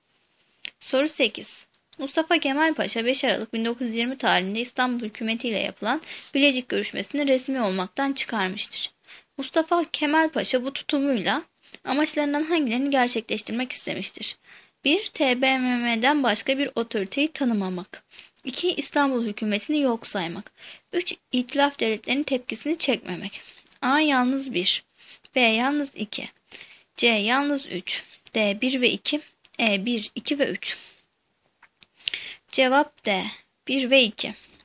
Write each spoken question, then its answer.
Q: Mustafa Kemal Paşa bu tutumuyla amaçlarından hangilerini gerçekleştirmek istemiştir?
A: Cevap D. 1 ve 2.